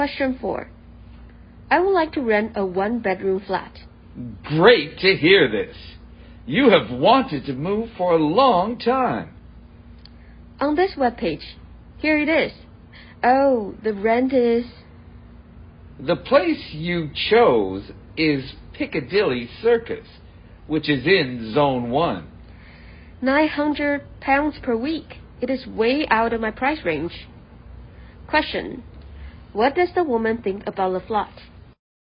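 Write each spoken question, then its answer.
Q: What does the woman think about the flat?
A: It is too expensive (out of her price range)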